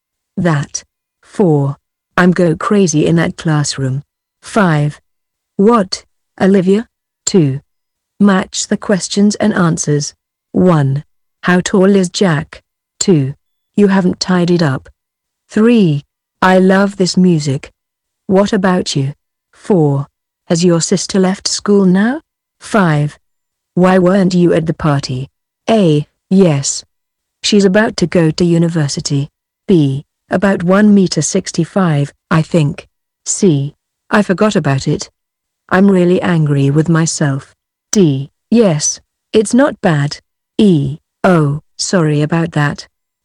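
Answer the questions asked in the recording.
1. B: About 1.65 m, I think.
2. E: Oh, sorry about that.
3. D: Yes, it's not bad.
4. A: Yes. She's about to go to university.
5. C: I forgot about it. I'm really angry with myself.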